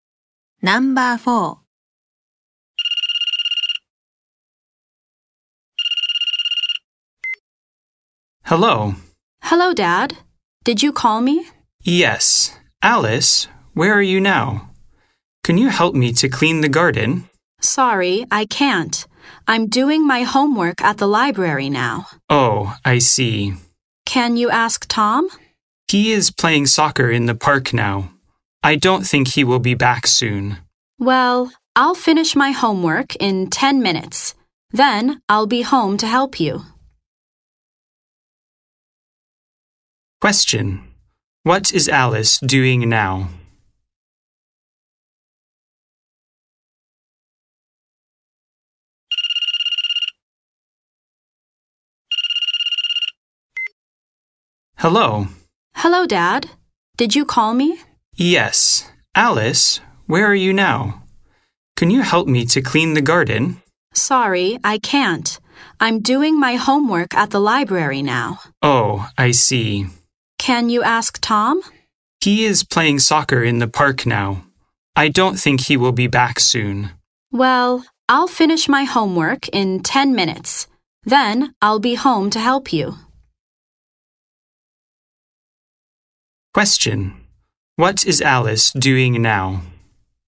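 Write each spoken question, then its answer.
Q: What is Alice doing now?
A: Doing her homework at the library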